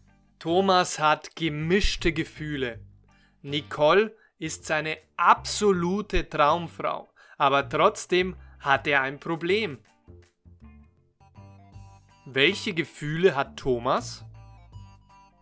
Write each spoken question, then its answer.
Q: Welche Gefühle hat Thomas?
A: gemischte. Thomas hat gemischte Gefühle.